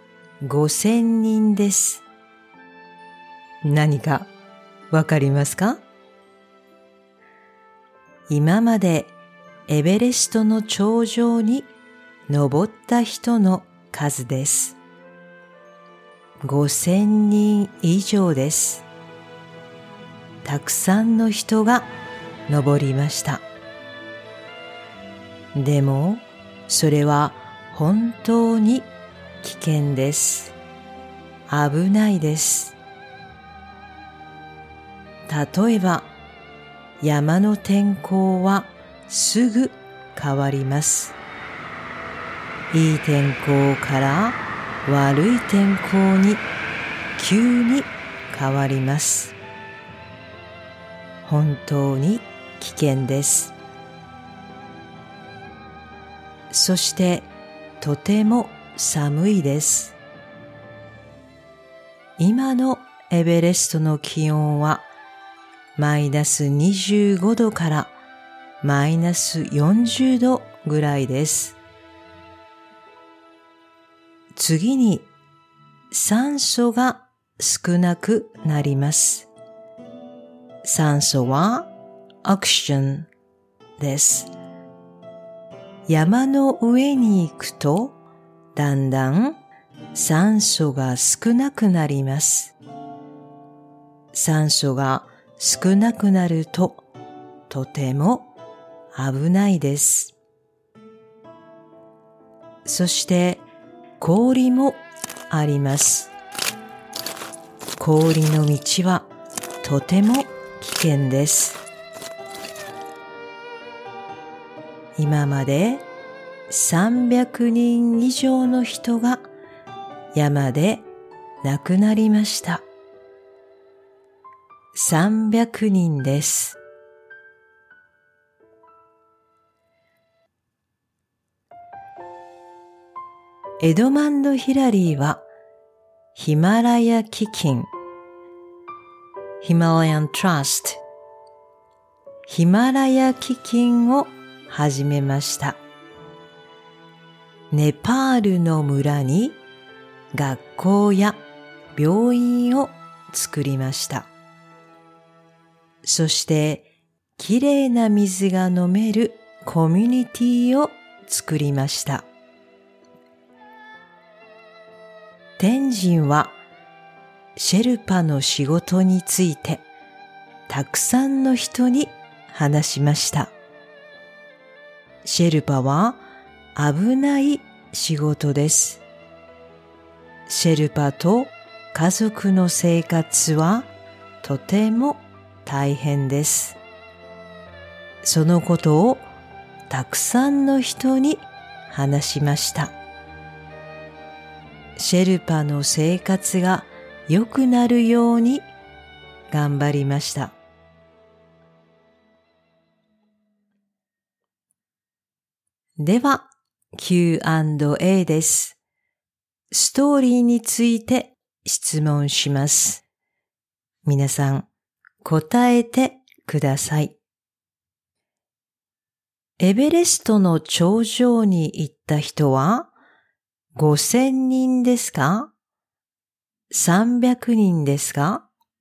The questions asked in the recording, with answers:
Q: エベレストの頂上に行った人は、 5000人ですか?300人ですか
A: 5000人です。